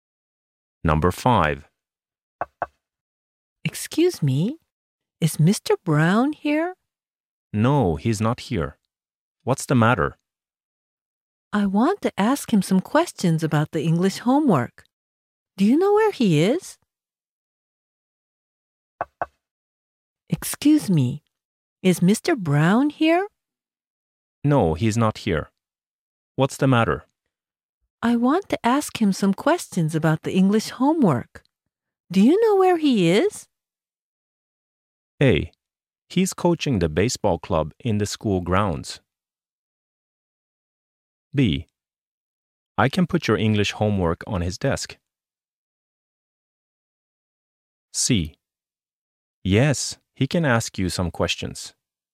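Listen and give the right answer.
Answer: A: He's coaching the baseball club in the school grounds.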